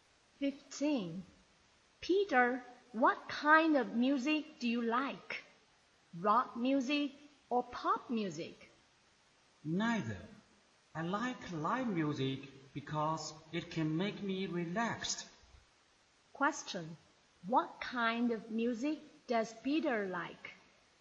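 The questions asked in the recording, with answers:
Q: What kind of music does Peter like?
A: Live music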